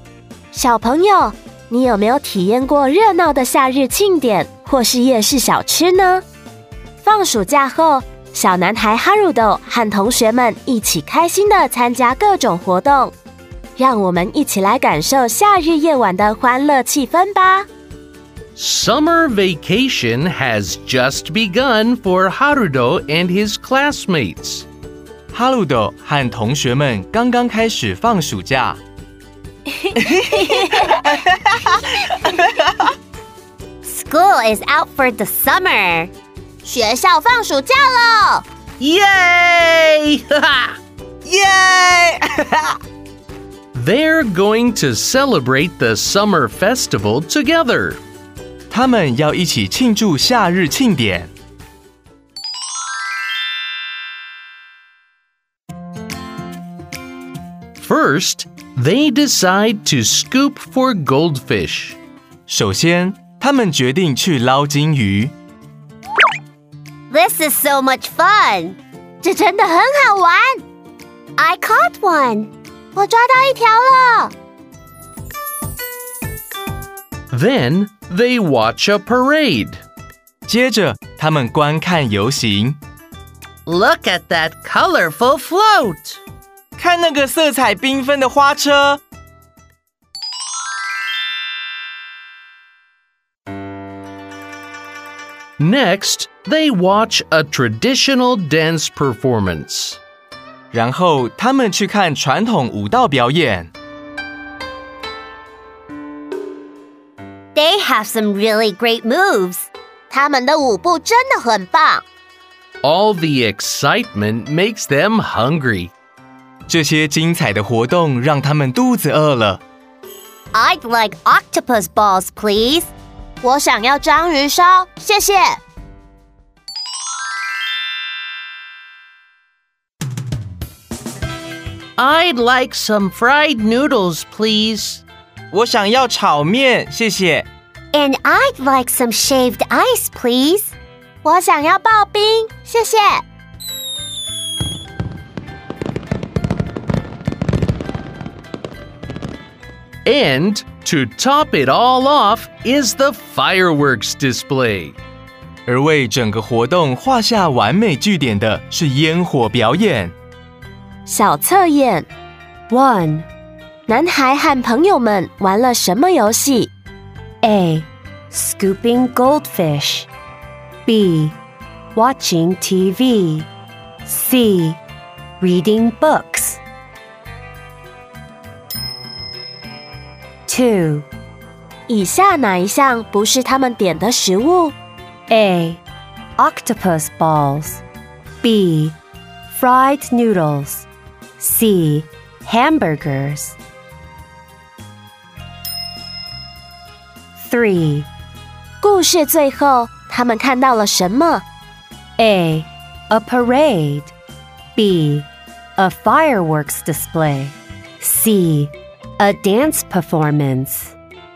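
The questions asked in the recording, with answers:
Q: 男孩和朋友们玩了什么游戏?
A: A: Scooping goldfish

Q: 以下哪一项不是他们点的食物?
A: C: Hamburgers

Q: 故事最后,他们看到了什么?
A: B: A fireworks display.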